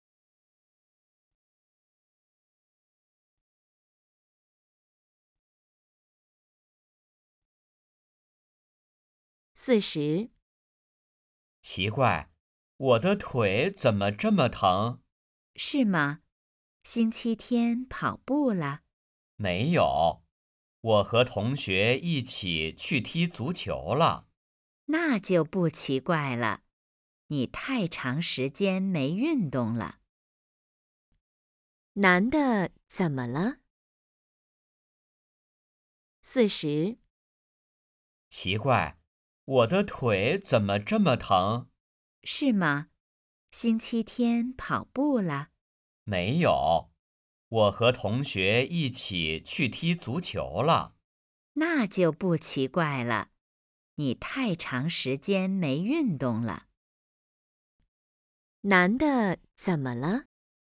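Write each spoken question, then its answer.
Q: 男的怎么了?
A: 腿疼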